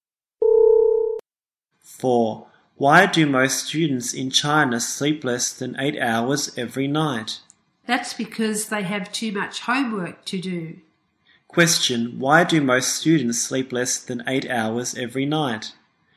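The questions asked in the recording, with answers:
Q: Question: Why do most students sleep less than 8 hours every night?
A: They have too much homework to do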